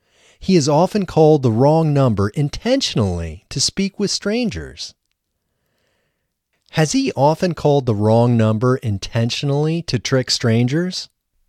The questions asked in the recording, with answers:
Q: Has he often called the wrong number intentionally to trick strangers?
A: No, he has not often called the wrong number intentionally to trick strangers.